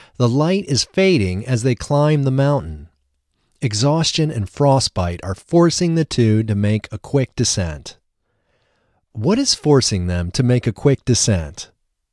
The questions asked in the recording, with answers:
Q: What is forcing them to make a quick descent?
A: Exhaustion and frostbite are forcing them to make a quick descent.